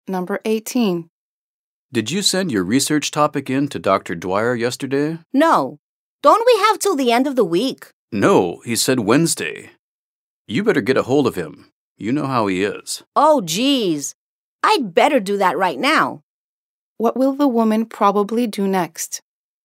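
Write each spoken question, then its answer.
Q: What will the woman probably do next?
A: Contact Dr. Dwyer right away about her research topic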